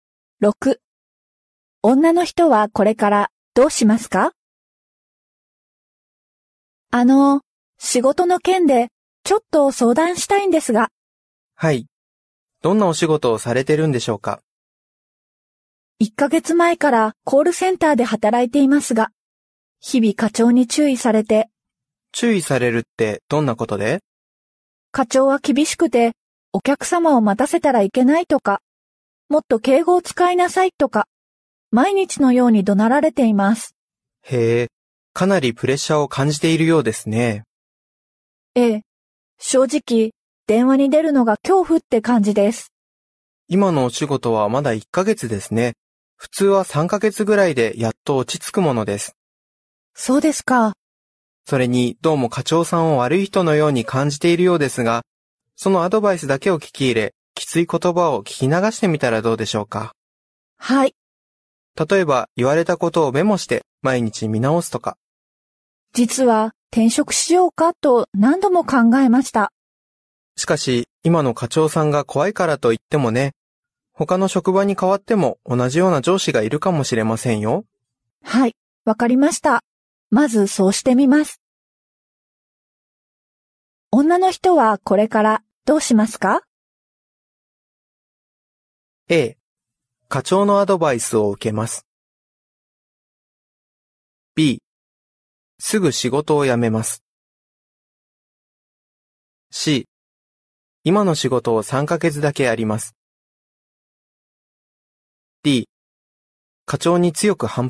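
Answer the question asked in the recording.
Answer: A: 課長のアドバイスを受けます。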